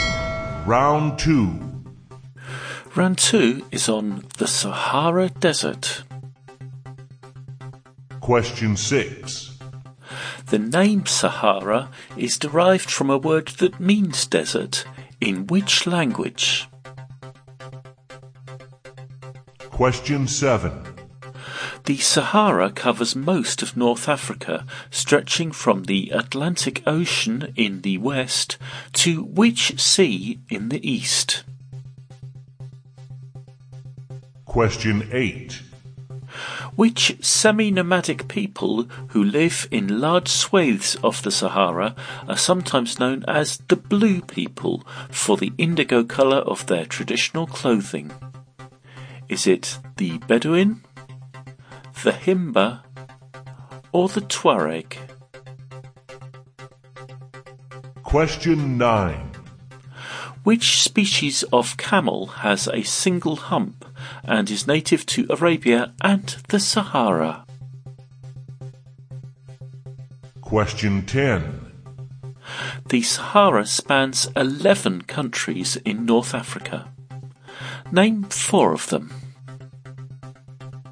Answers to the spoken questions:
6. Sahara is derived from a word in Arabic.
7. the eastern coast of the Sahara Desert is on the Red Sea.
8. that semi-nomadic people are the Tuareg.
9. the species of camel is the dromedary.
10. Algeria, Chad, Egypt, Libya, Mali, Mauritania, Morocco, Niger, Sudan, or Tunisia.